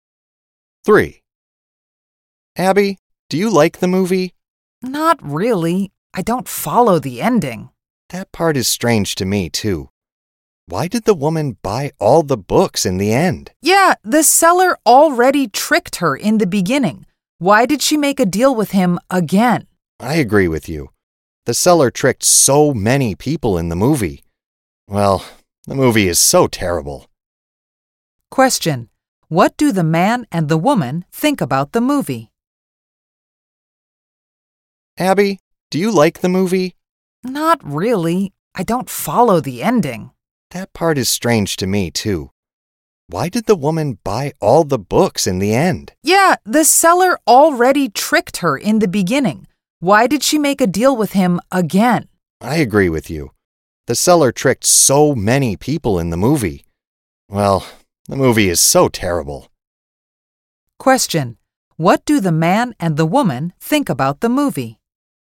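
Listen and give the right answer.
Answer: They think it is terrible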